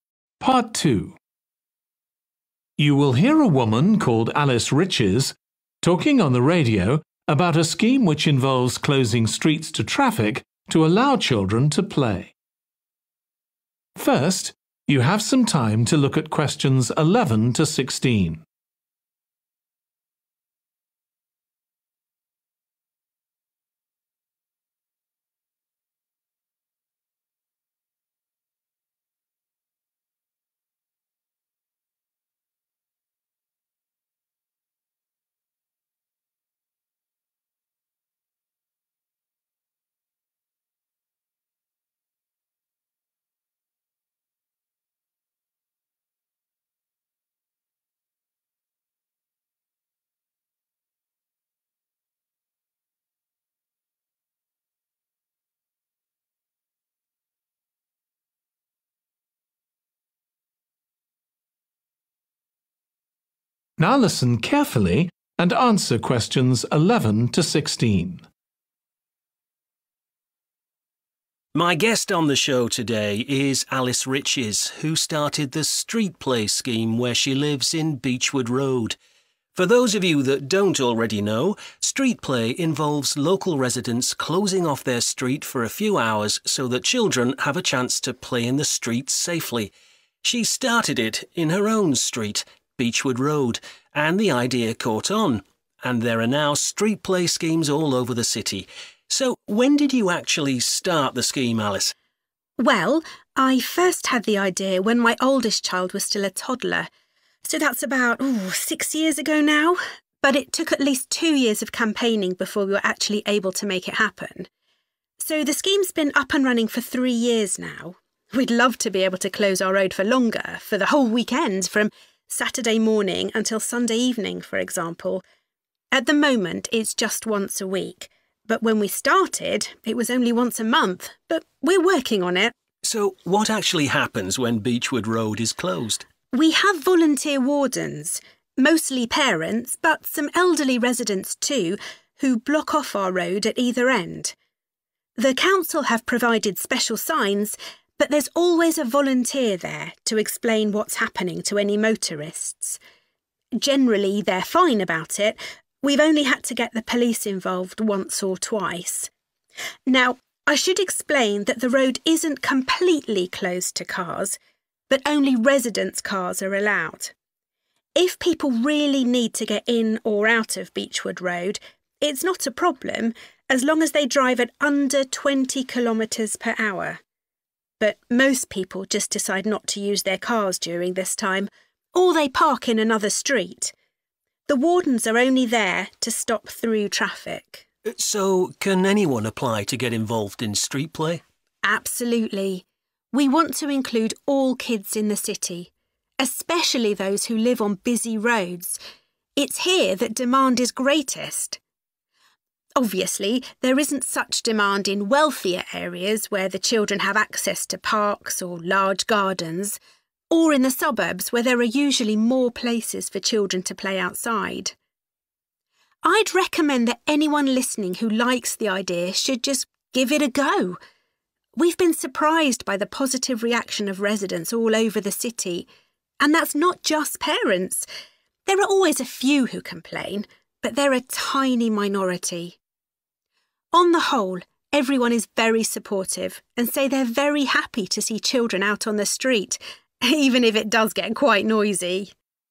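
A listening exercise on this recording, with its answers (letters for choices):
Choose the correct letter, A, B or C.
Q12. How often is Beechwood Road closed to traffic now?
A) once a week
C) once a month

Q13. Who is responsible for closing the road?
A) a council official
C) local wardens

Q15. Alice says that Street Play Schemes are most needed in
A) wealthy areas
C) areas with heavy traffic.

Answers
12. A
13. C
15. C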